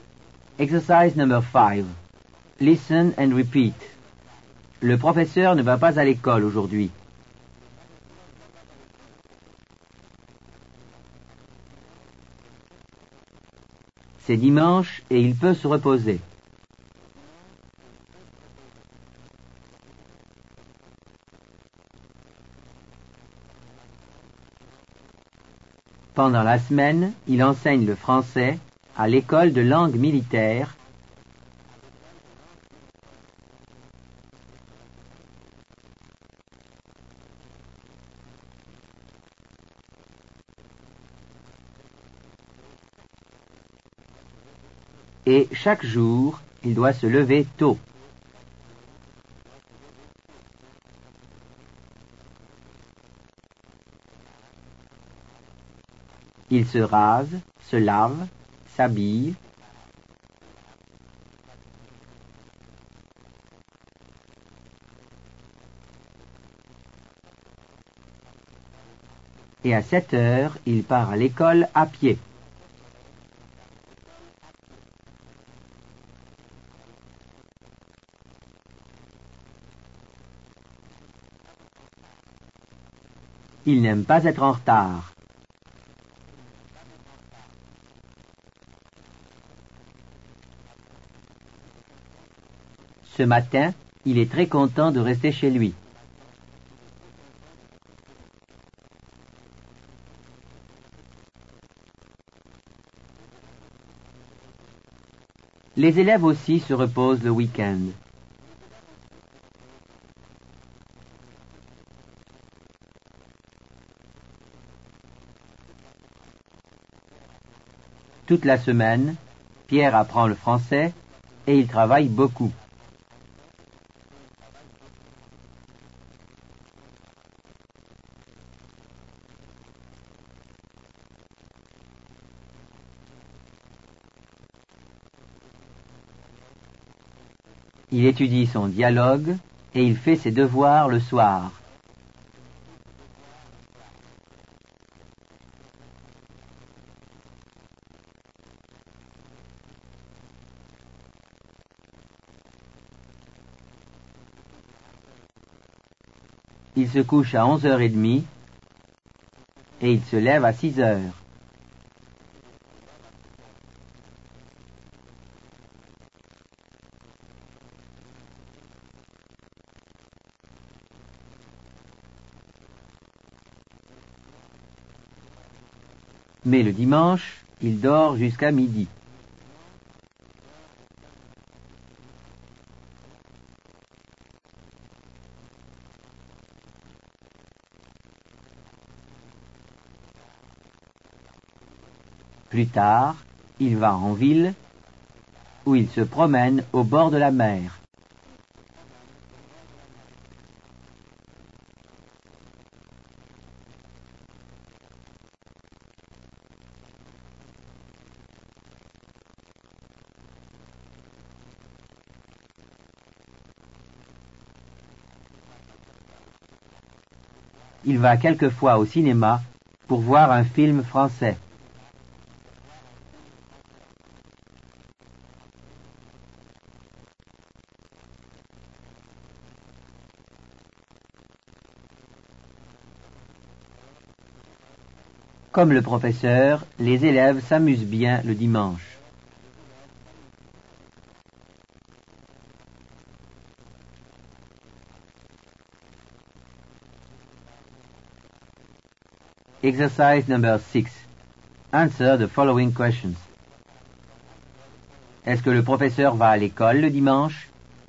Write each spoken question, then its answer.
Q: Est-ce que le professeur va à l'école le dimanche?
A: Non, le professeur ne va pas à l'école le dimanche.